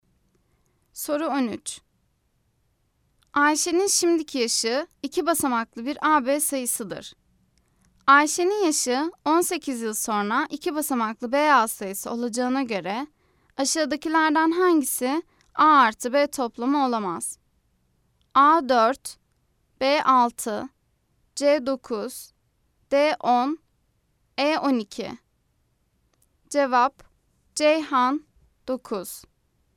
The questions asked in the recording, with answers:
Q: Ayşe'nin yaşı 18 yıl sonra iki basamaklı BA sayısı olacağına göre aşağıdakilerden hangisi A artı B toplamı olamaz?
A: Cevap: Ceyhan 9.